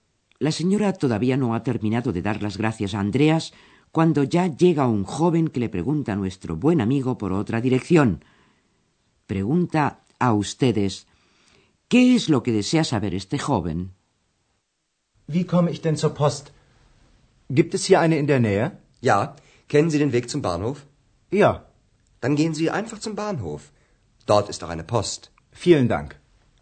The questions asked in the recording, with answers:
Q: ¿Qué es lo que desea saber este joven?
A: El joven deseaba saber si hay una